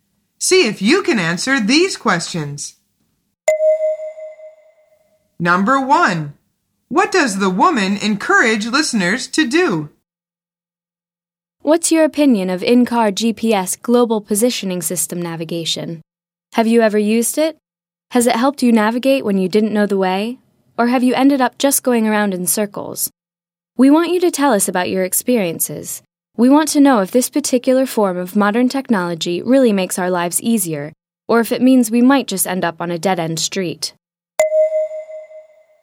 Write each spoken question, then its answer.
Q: what does the woman encourage listeners to do?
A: The answer is tell her about their experiences with GPS.